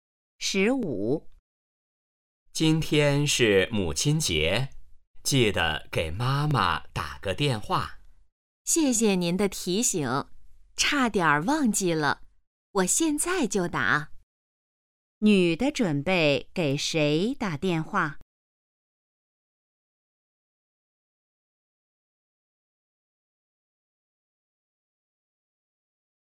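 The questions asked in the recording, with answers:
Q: 女的准备给谁打电话?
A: 妈妈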